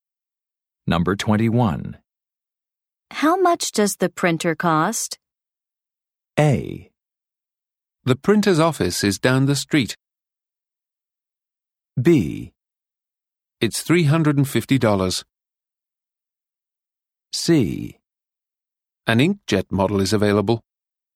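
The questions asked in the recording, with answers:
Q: How much does the printer cost?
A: B: It's $350.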